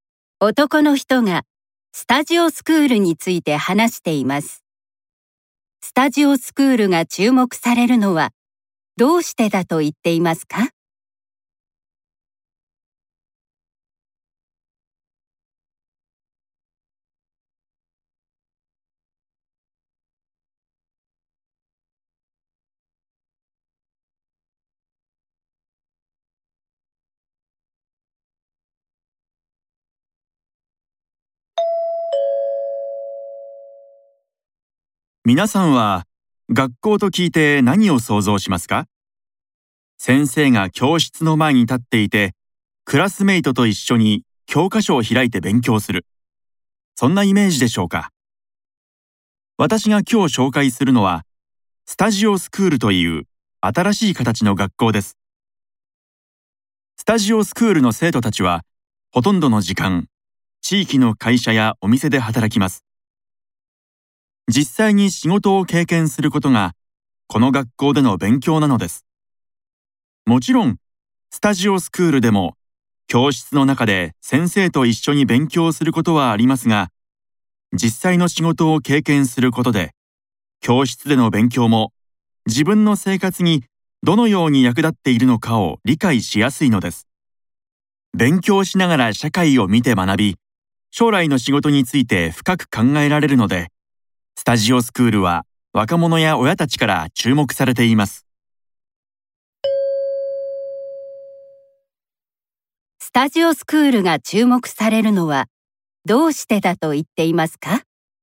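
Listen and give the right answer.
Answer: 勉強しながら社会を見て学び、将来の仕事について深く考えられるから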